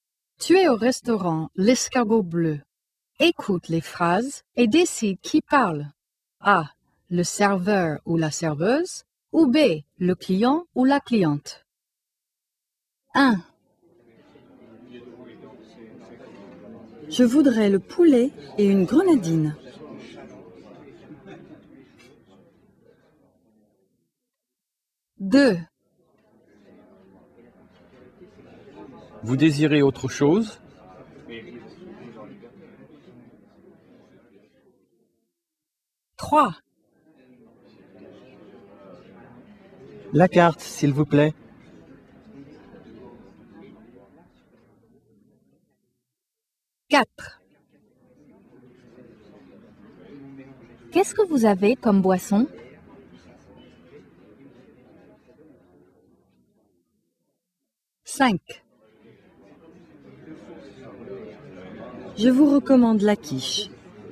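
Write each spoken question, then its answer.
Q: Écoute les phrases et décide qui parle.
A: B: Le client ou la cliente

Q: Écoute les phrases et décide qui parle.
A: A: Le serveur ou la serveuse

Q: Écoute les phrases et décide qui parle.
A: B: Le client ou la cliente

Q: Écoute les phrases et décide qui parle.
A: B: Le client ou la cliente

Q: Écoute les phrases et décide qui parle.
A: A: Le serveur ou la serveuse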